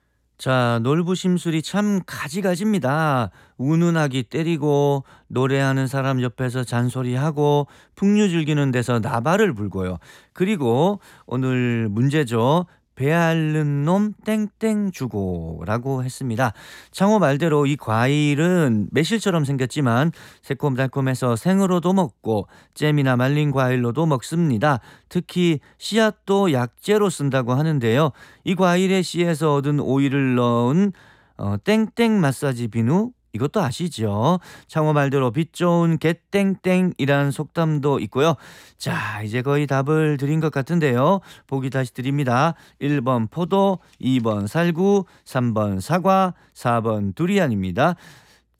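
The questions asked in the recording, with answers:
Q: 그리고 오늘 문제죠. 배앓는 놈 땡땡 주고라고 했습니다.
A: 2: 살구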